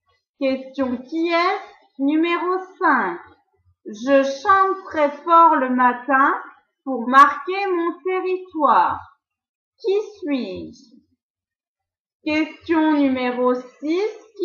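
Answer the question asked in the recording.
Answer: le coq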